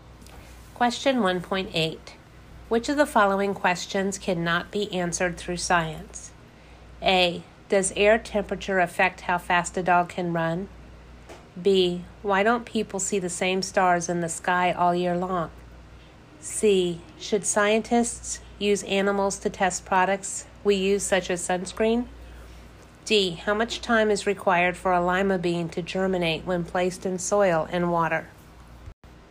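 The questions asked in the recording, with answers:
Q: Which of the following questions cannot be answered through science?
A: C: Should scientists use animals to test products we use, such as sunscreen?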